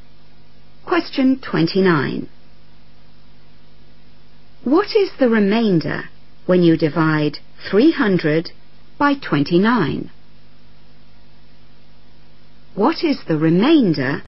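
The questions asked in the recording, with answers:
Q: What is the remainder when you divide 300 by 29?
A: 10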